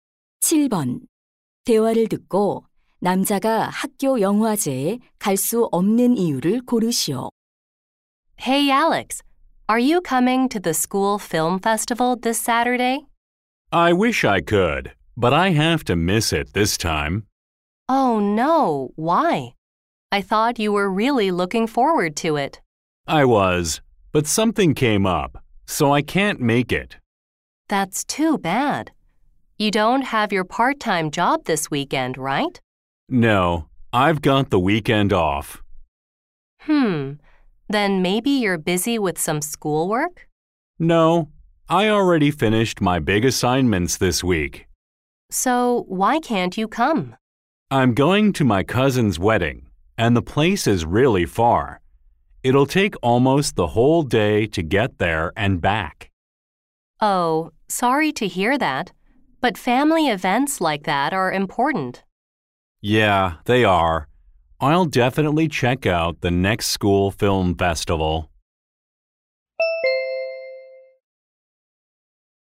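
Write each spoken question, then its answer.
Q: 대화를 듣고 남자가 학교 영화제에 갈 수 없는 이유를 고르시오.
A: 사촌의 결혼식에 가야 해서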